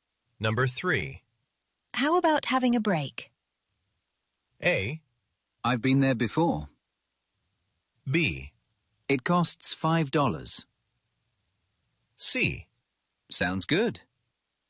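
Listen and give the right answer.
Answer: C: Sounds good.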